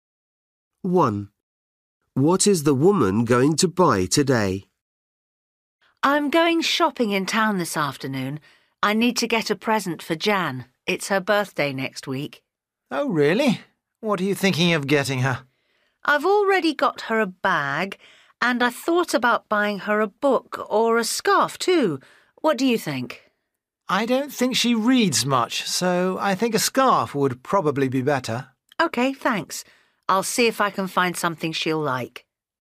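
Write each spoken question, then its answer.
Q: What is the woman going to buy today?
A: a scarf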